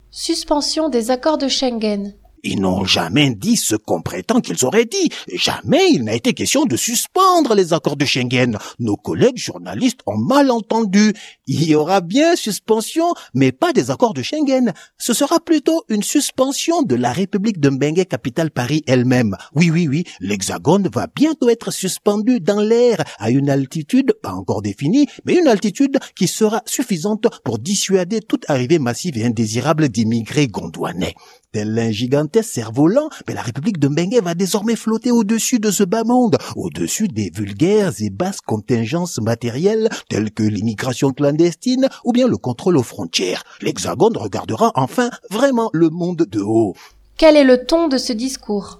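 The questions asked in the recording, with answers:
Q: Quel est le ton de ce discours ?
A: Ironique, satirique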